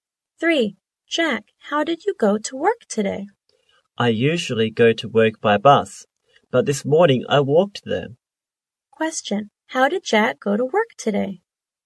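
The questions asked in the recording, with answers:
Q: Question, how did Jack go to work today?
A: He walked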